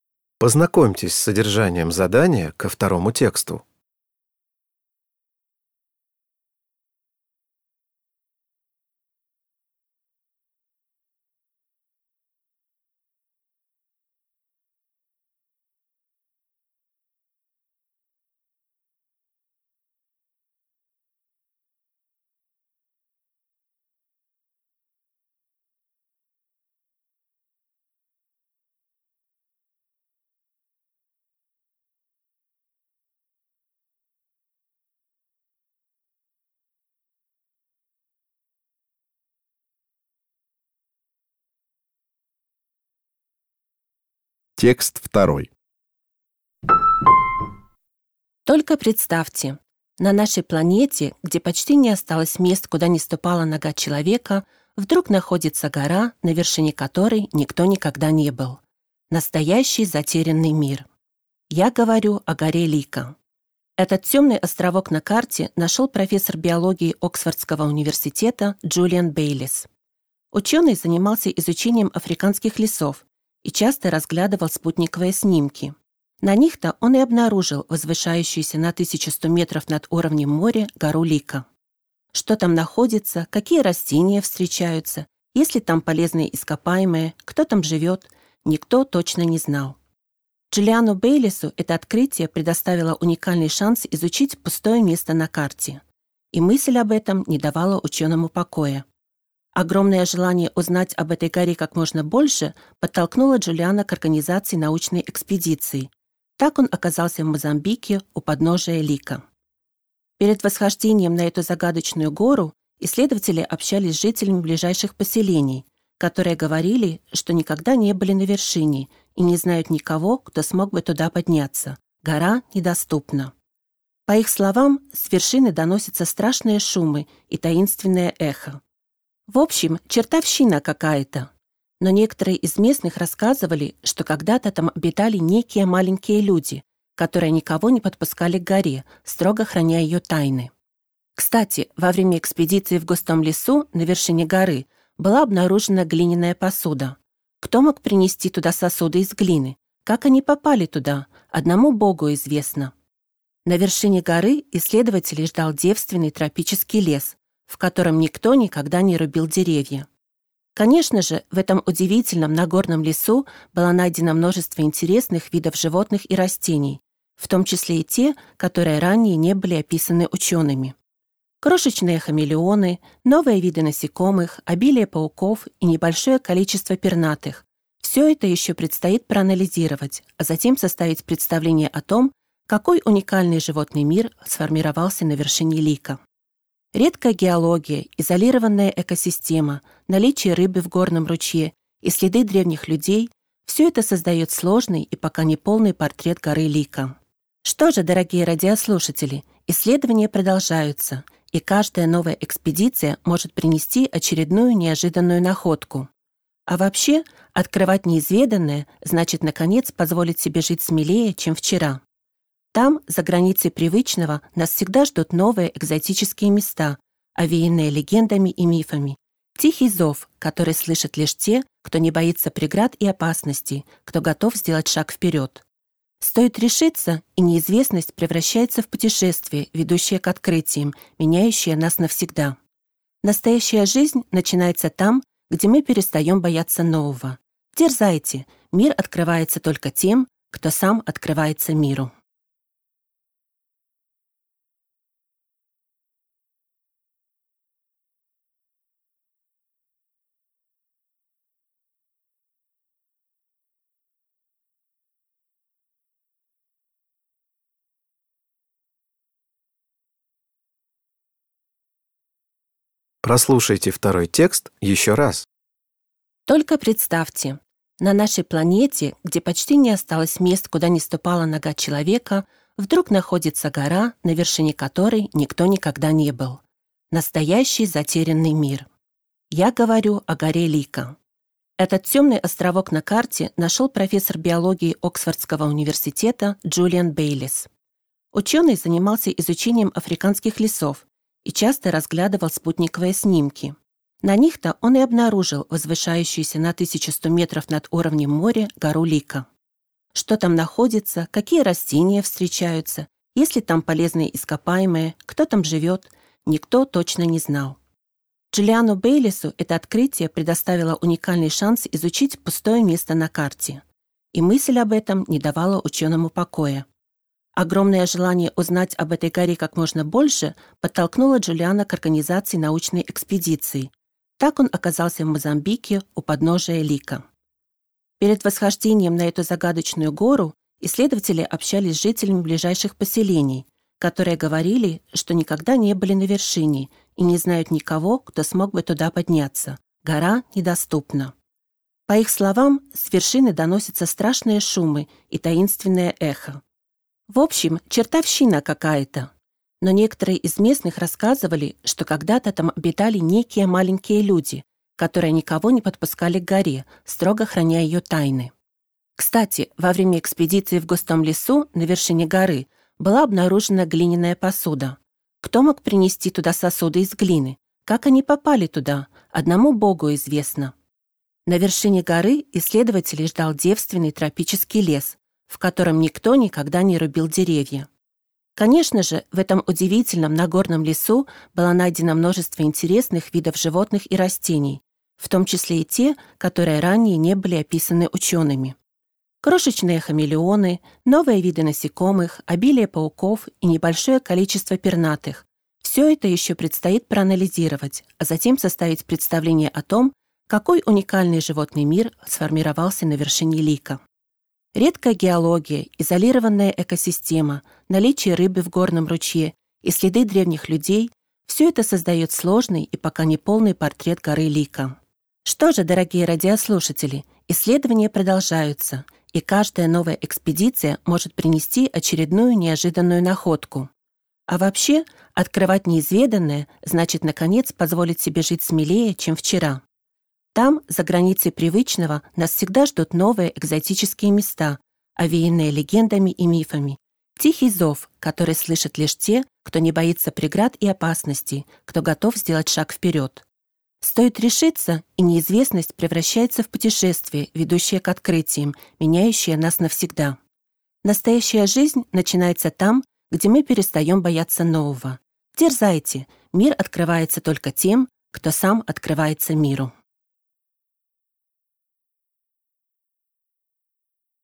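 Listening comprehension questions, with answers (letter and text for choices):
Прослушайте дважды два текста. Из предложенных ответов (A–D) выберите правильный ответ, соответствующий содержанию текста, и обведите его кружком. Задания 2.1.–2.3. относятся к первому тексту, а задания 2.4.–2.6. – ко второму.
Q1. Гора Лико заинтересовала Джулиана Бейлисса, потому что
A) он хотел разработать новый туристический маршрут в лесах Африки.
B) на её вершине были открыты залежи редких минералов.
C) её до сих пор никто не исследовал.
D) его привлекла загадочная легенда.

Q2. Каким выражением можно описать мнение местных жителей о горе Лико?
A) Не боги горшки обжигают.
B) Книга за семью печатями.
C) Под лежачий камень вода не течёт.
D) Не так страшен чёрт, как его малюют.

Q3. Обращаясь к слушателям в конце текста, автор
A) призывает осваивать новые горизонты.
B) рекомендует необычные туристические направления.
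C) советует черпать вдохновение в древних мифах и поверьях.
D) предостерегает перед опасностью нарушения баланса между природой и человеком.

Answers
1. C) её до сих пор никто не исследовал.
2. B) Книга за семью печатями.
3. A) призывает осваивать новые горизонты.

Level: Poziom: dwujęzyczny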